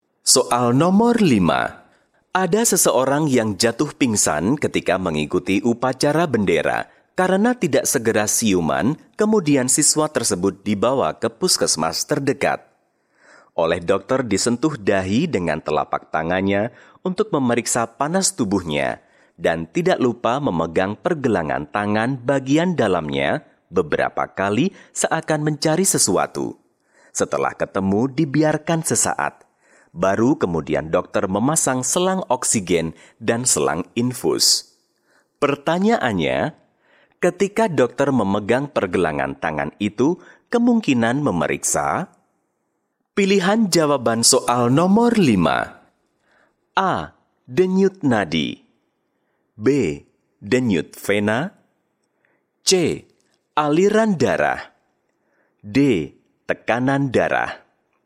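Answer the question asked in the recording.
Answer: A: Denyut nadi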